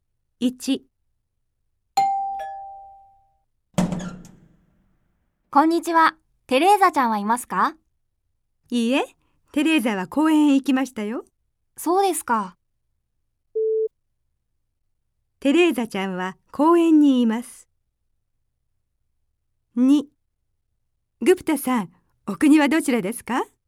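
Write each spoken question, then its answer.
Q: テレーザちゃんは公園にいます。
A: ○(正しい)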